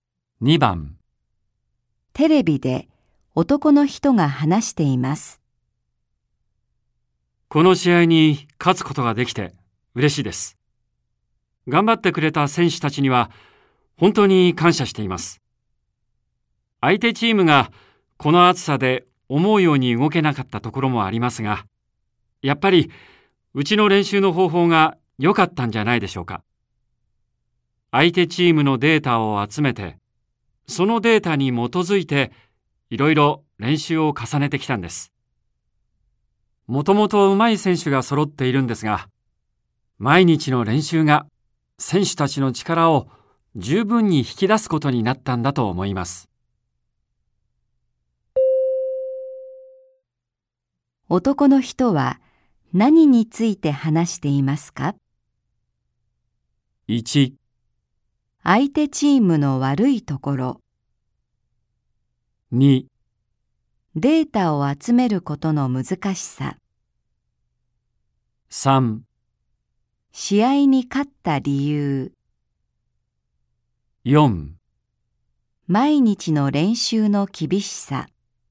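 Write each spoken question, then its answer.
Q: 男の人は何について話していますか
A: 3: 試合に勝った理由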